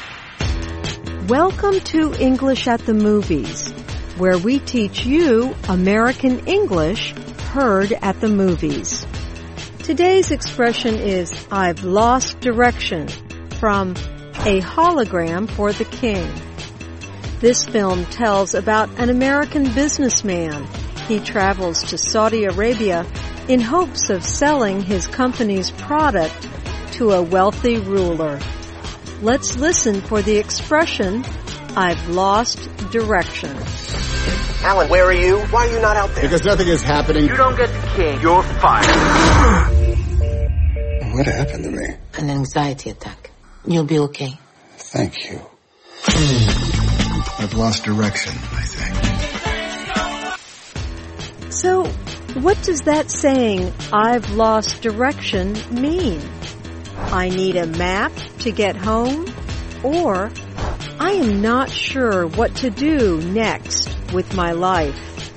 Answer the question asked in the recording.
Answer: I've lost direction means you are not sure what to do next.